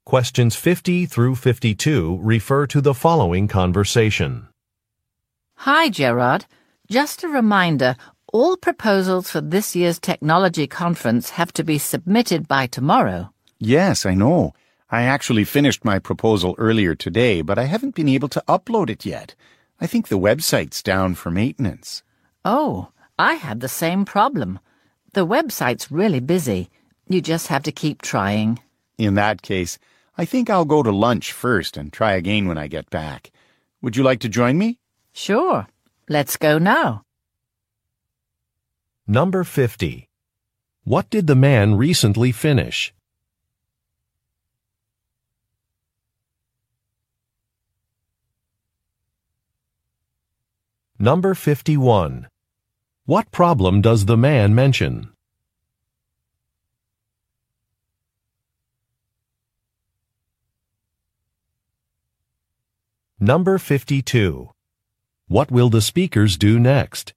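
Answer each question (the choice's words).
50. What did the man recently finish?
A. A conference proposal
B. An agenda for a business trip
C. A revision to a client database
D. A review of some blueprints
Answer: A conference proposal

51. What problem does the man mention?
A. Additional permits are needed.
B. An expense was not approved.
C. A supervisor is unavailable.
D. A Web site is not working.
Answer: A Web site is not working.

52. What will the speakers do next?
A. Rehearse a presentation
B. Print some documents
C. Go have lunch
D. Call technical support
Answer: Go have lunch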